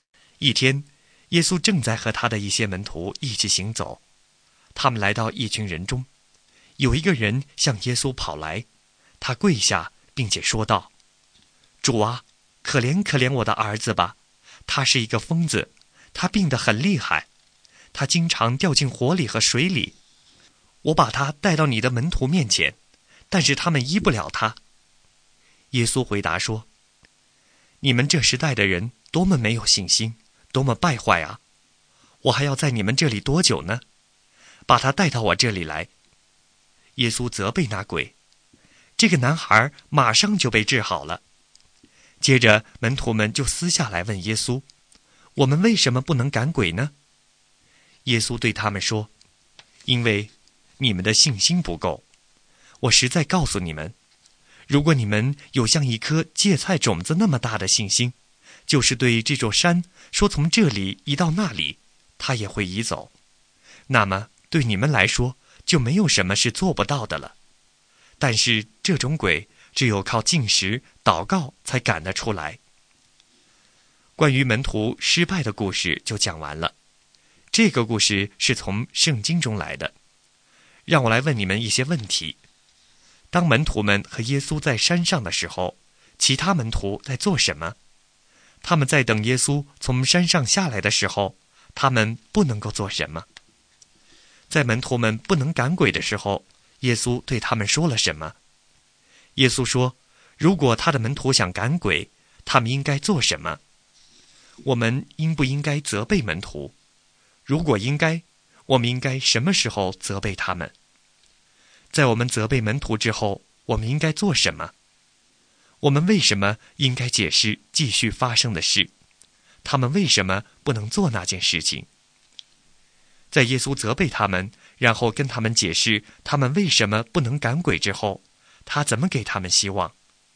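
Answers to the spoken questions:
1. 不能医治那个男孩(不能赶鬼)
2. 因为你们的信心不够
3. 禁食祷告
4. 因为他们的信心不够
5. 因为他说,对你们来说,没有什么是不可能的。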